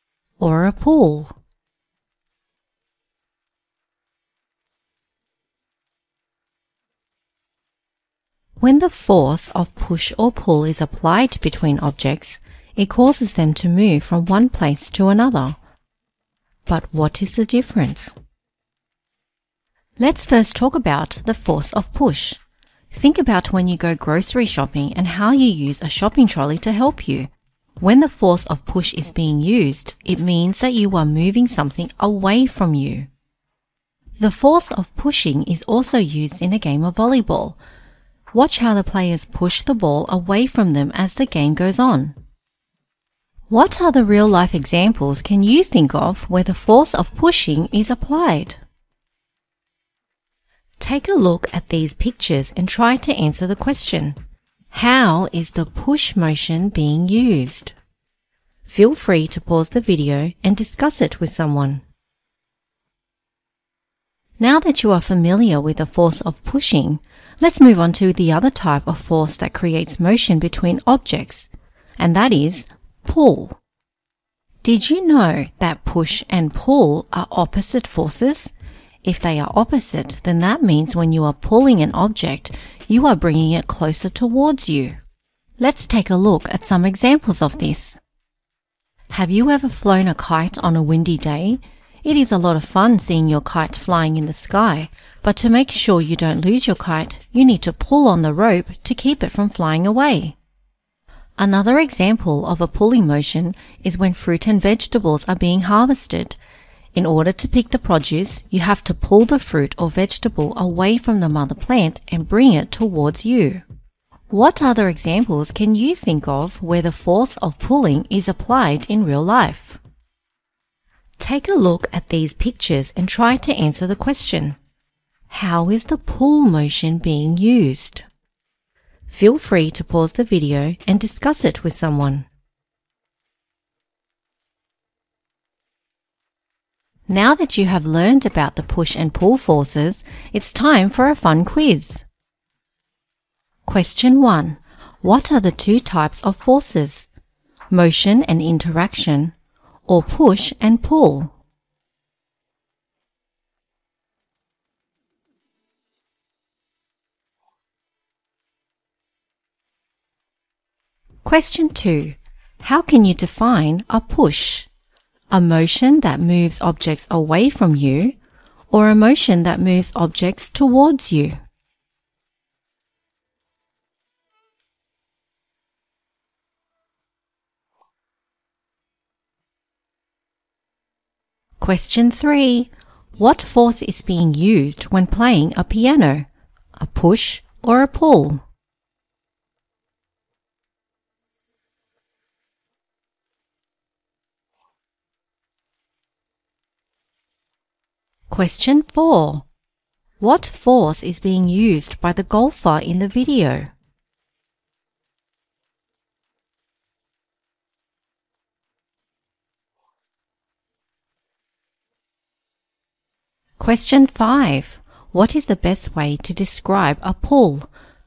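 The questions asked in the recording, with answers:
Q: What are the two types of forces?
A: push and pull

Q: How can you define a push?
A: A motion that moves objects away from you

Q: What is the best way to describe a pull?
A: A motion that moves objects towards you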